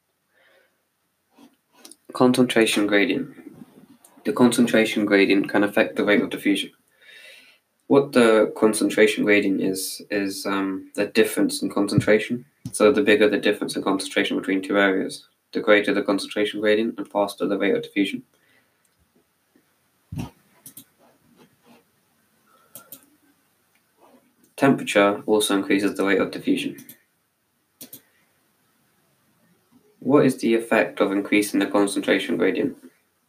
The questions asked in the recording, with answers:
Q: What is the effect of increasing the concentration gradient?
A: It increases the rate of diffusion.